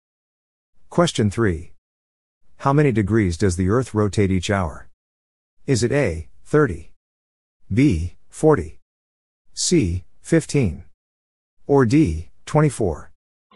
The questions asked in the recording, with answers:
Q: How many degrees does the Earth rotate each hour?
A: The answer is C, 15.